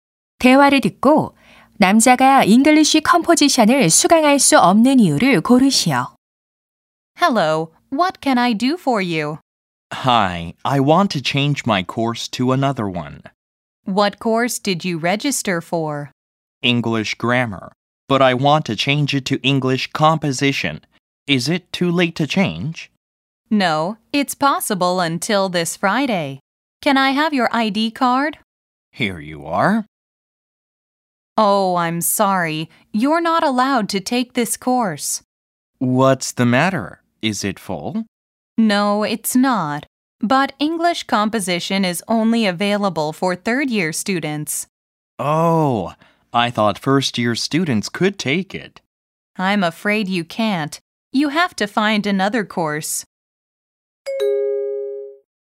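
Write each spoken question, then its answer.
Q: 대화를 듣고 남자가 잉글리쉬 컴포지션을 수강할 수 없는 이유를 고르시오.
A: 3학년 학생만 수강할 수 있어서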